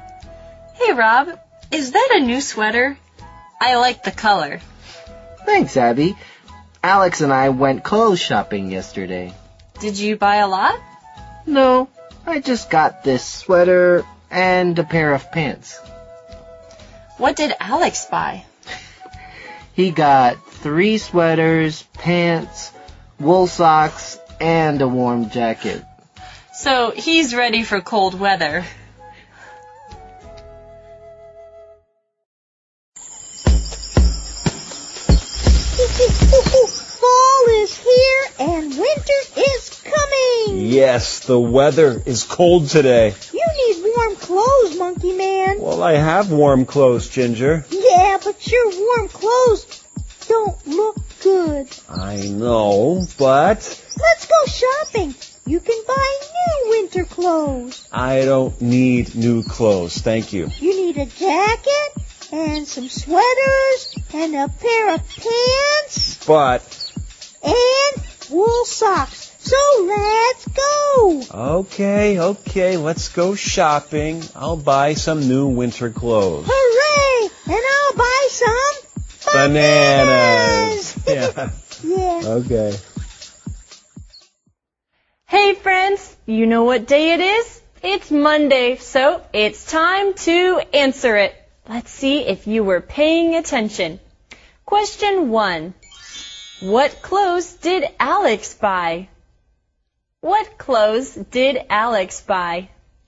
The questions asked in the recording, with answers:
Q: What clothes did Alex buy?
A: He bought 3 sweaters, pants, wool socks, and a warm jacket.